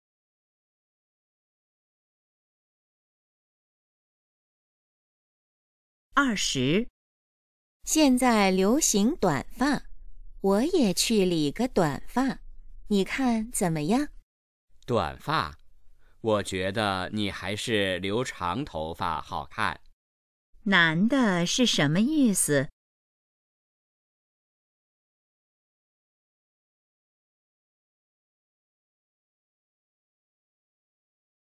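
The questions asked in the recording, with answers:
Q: 男的是什么意思?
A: 女的留长头发好看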